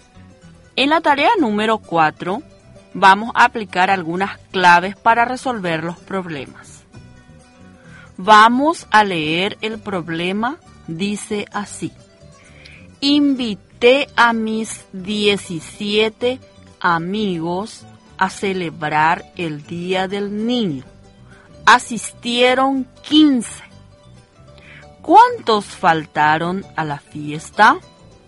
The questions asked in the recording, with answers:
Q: ¿Cuántos faltaron a la fiesta?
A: Faltaron a la fiesta 2.